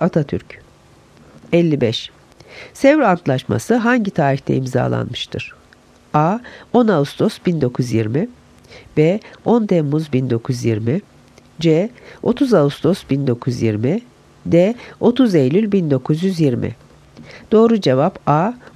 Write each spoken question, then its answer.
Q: Sevr Antlaşması hangi tarihte imzalanmıştır?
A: Doğru cevap A. 10 Ağustos 1920